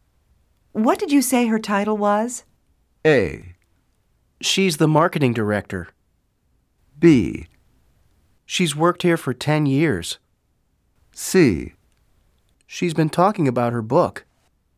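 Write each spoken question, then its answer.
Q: What did you say her title was?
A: A: She's the marketing director.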